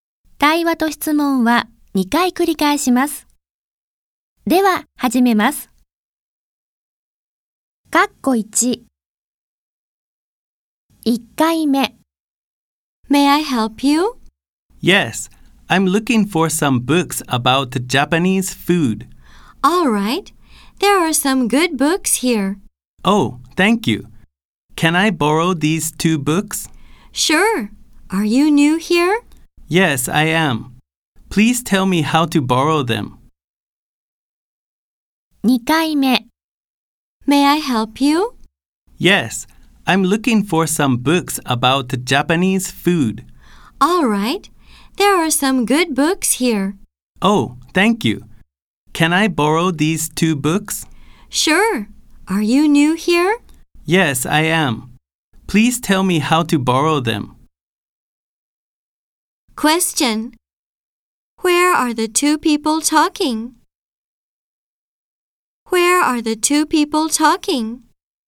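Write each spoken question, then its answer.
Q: Where are the 2 people talking?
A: In a library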